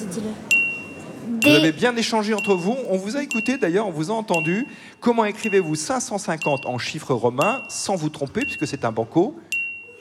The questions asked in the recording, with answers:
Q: Comment écrivez-vous 550 en chiffres romains, sans vous tromper, puisque c'est un banco?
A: DL. D pour 500, L pour 50.